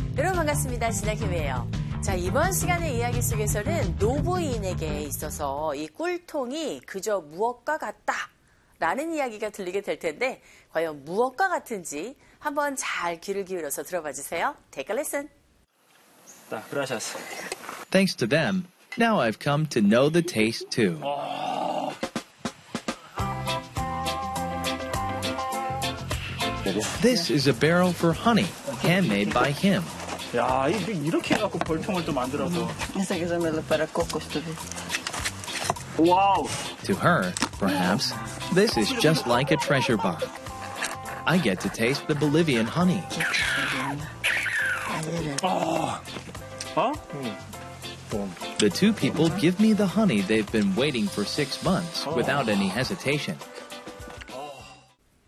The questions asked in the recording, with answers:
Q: 노부인에게 있어서 이 꿀통이 그저 무엇과 같다라는 이야기가 들리게 될 텐데, 과연 무엇과 같은지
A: To her, this is, right, like a treasure box